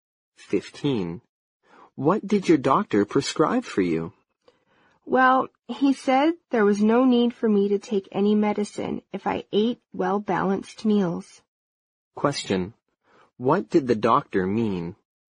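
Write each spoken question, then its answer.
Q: What did the doctor mean?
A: She needs no medicine, only well-balanced meals.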